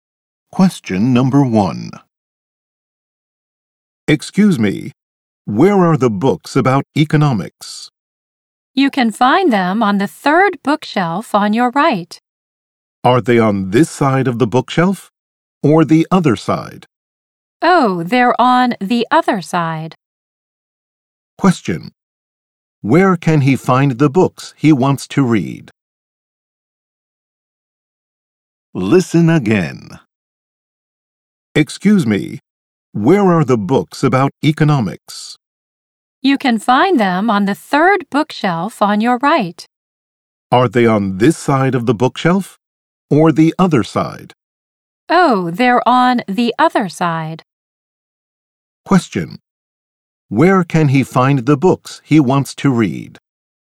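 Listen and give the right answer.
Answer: On the other side of the third bookshelf on his right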